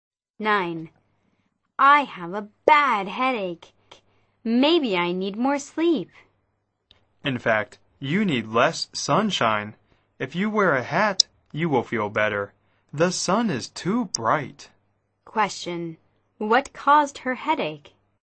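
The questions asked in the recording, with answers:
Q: Question. What caused her headache?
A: Too much sunshine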